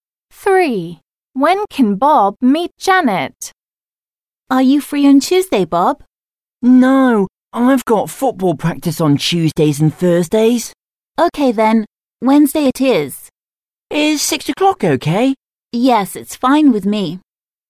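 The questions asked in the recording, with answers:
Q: When can Bob meet Janet?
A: Wednesday at 6 o'clock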